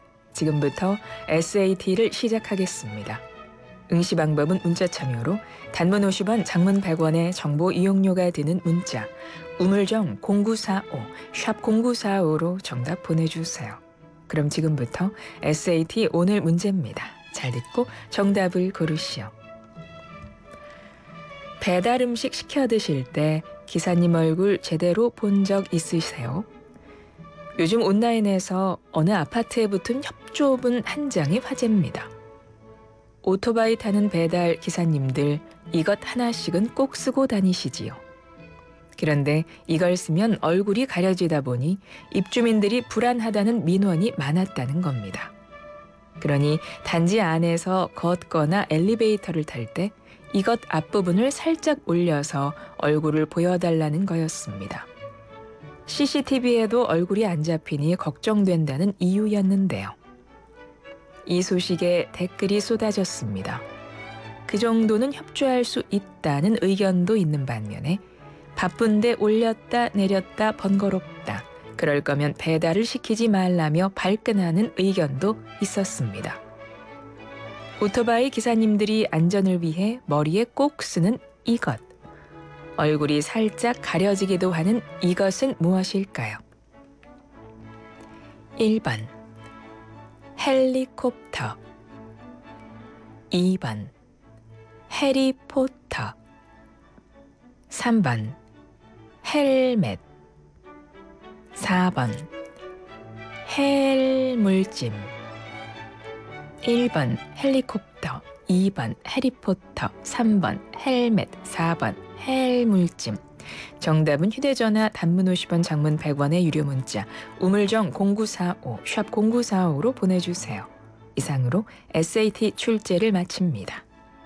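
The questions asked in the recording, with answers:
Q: 얼굴이 살짝 가려지기도 하는 이것은 무엇일까요?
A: 3: 헬멧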